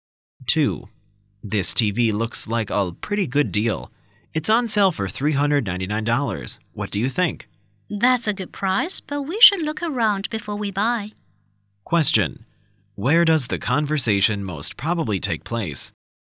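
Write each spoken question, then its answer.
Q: Where does the conversation most probably take place?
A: In a store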